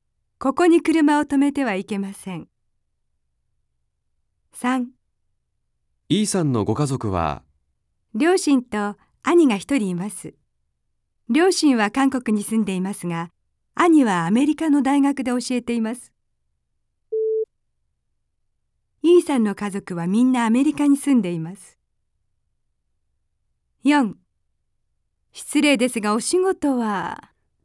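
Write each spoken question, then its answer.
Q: E さんの家族はみんなアメリカに住んでいます。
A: 正しくない(×)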